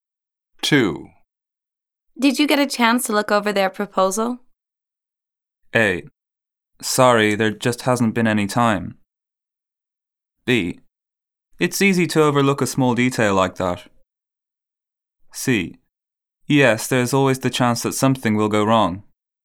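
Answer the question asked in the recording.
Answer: A: Sorry, there just hasn't been any time.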